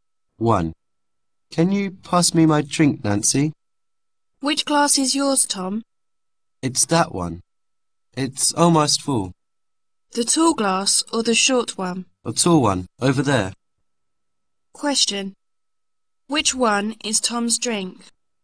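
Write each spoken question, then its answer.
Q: Which one is Tom's drink?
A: The tall glass that is almost full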